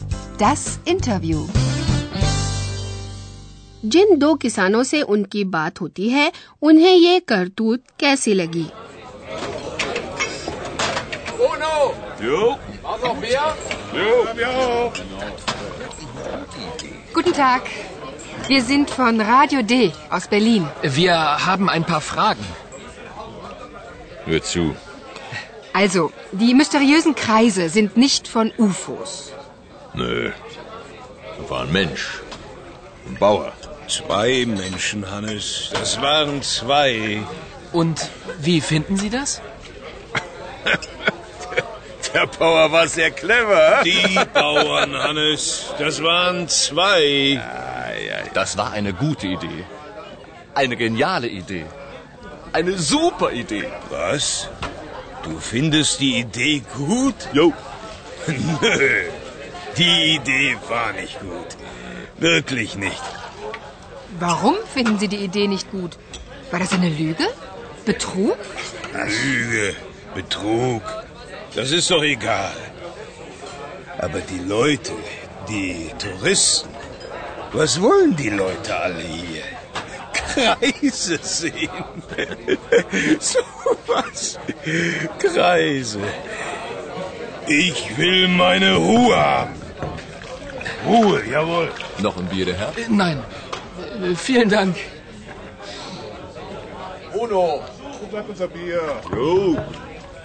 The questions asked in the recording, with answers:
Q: जिन दो किसानों से उनकी बात होती है उन्हें ये करतूत कैसी लगी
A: गांव के इन दोनों किसानों की राय बिल्कुल अलग अलग है एक को लगता है कि वह किसान बहुत ही चतुर था